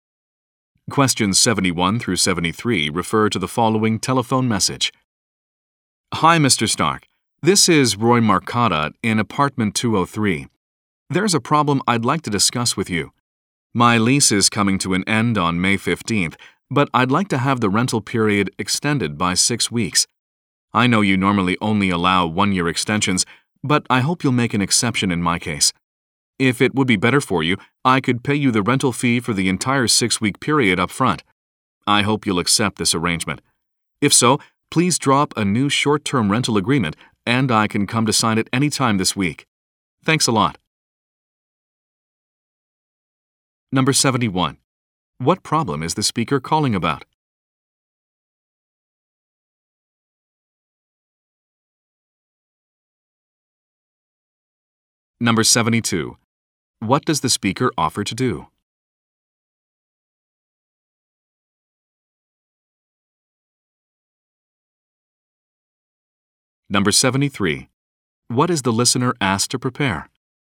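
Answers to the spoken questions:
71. He wants his lease extended by 6 weeks
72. Pay the 6-week rent up front
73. A short-term rental agreement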